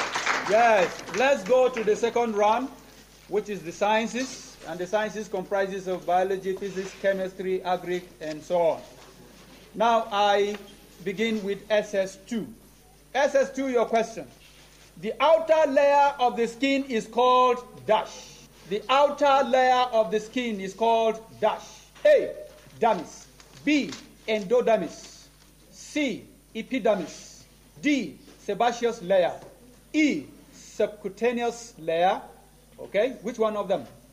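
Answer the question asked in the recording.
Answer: C: epidermis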